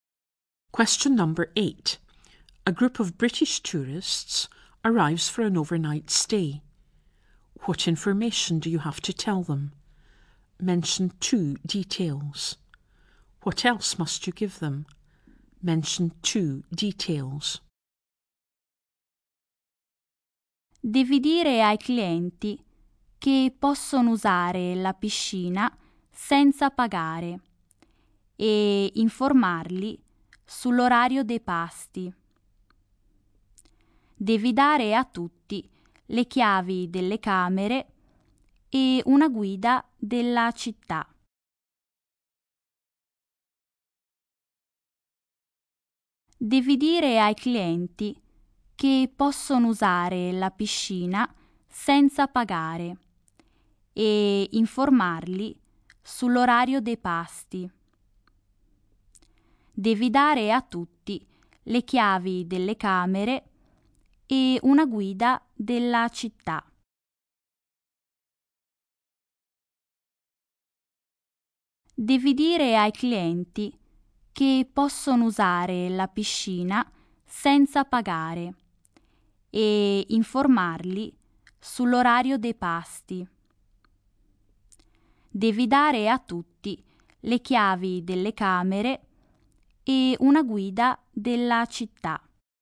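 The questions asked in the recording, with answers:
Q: What information do you have to tell them?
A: They can use the pool for free, and what the mealtimes are

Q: What else must you give them?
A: The room keys and a city guide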